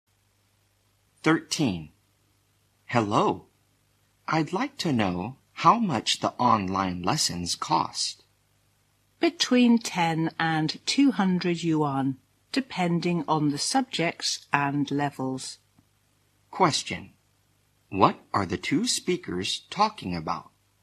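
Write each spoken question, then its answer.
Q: What are the two speakers talking about?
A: The cost of online lessons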